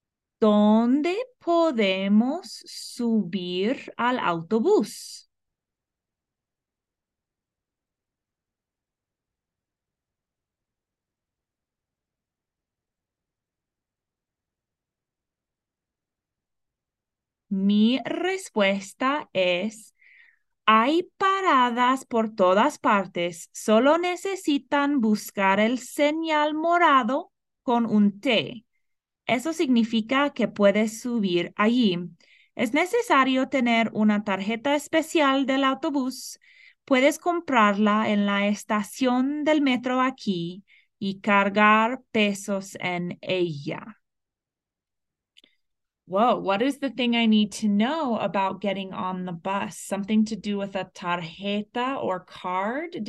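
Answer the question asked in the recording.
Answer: You need a special bus card, bought at the metro station and loaded with pesos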